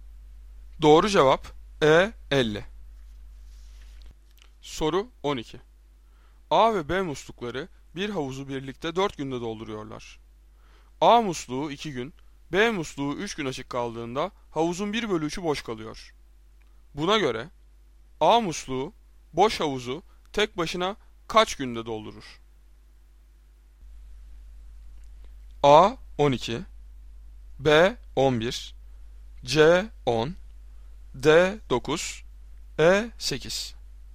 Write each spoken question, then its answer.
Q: Buna göre A musluğu boş havuzu tek başına kaç günde doldurur?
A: Doğru cevap A 12.